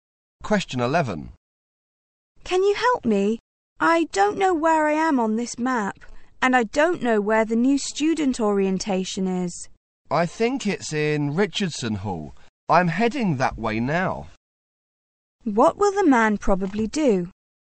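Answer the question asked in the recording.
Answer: Take the woman to Richardson Hall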